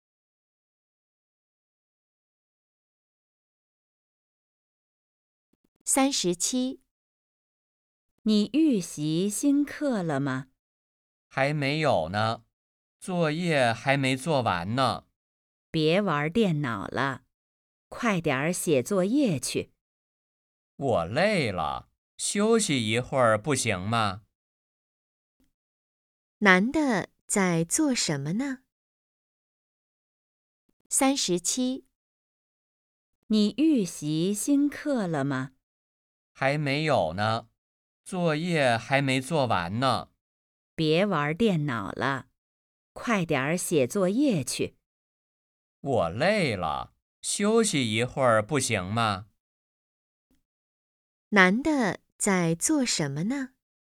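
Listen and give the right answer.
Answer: 玩电脑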